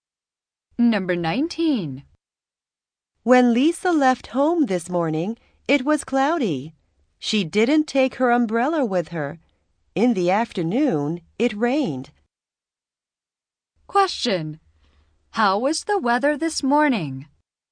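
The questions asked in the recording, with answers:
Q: How was the weather this morning?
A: It was cloudy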